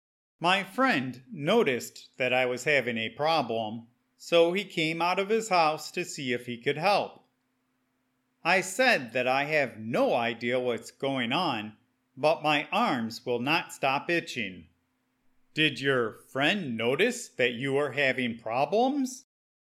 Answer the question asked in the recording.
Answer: Yes, my friend saw that I was itching the skin off of my arms, so he came out to see if he could help.